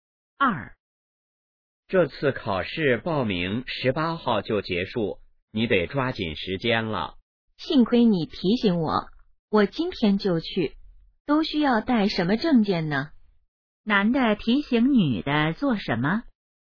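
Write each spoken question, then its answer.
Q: 男的提醒女的做什么?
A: 抓紧时间报名考试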